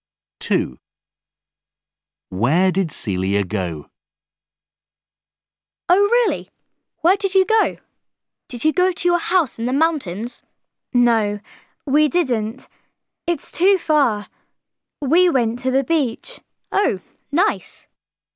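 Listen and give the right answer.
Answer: To the beach.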